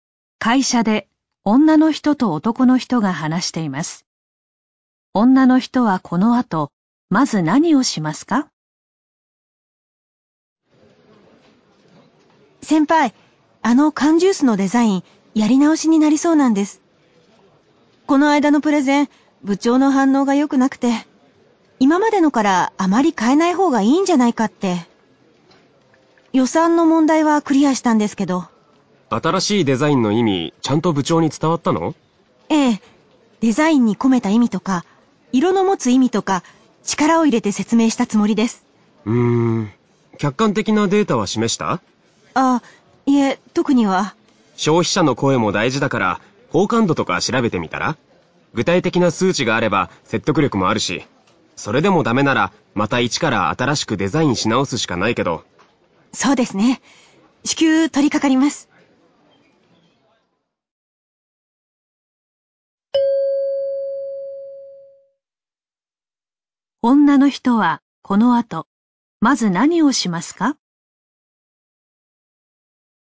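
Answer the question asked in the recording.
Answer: 消費者の好感度を調べる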